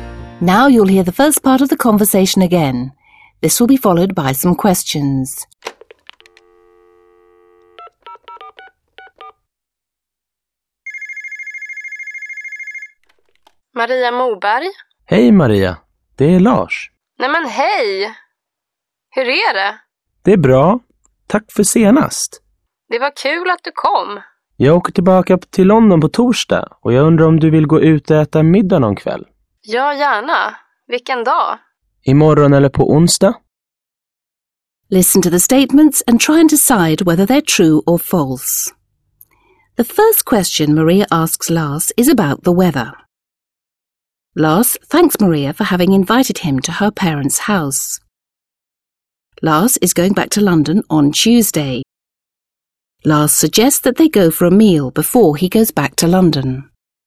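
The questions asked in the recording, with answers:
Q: The first question Maria asks Lars is about the weather.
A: False

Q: Lars is going back to London on Tuesday.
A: False

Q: Lars suggests that they go for a meal before he goes back to London.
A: True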